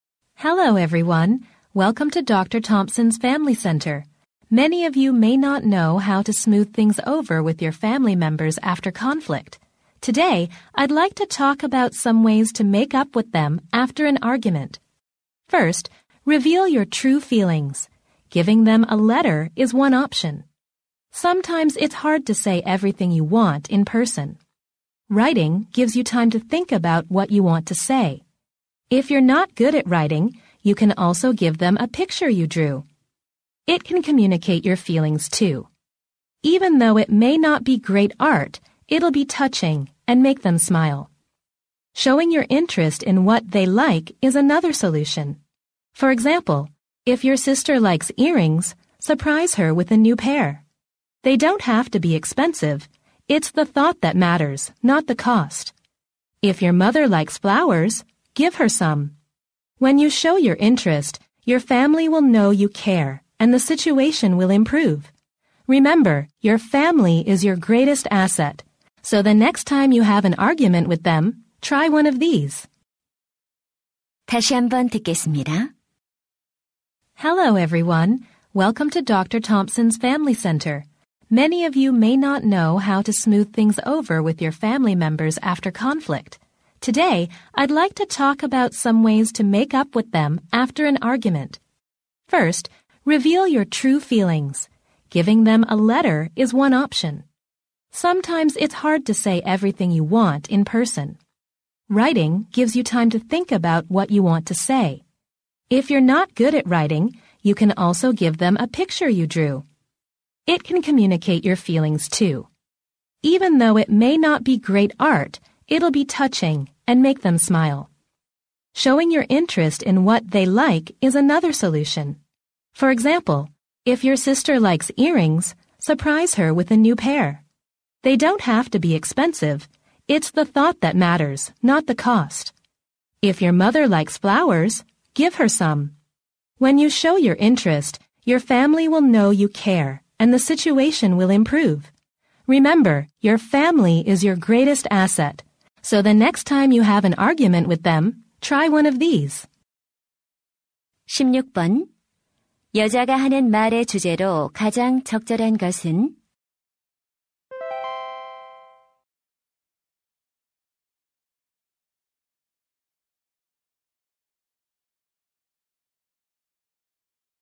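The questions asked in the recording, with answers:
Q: 여자가 하는 말의 주제로 가장 적절한 것은?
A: 말다툼 후 가족과 화해하는 방법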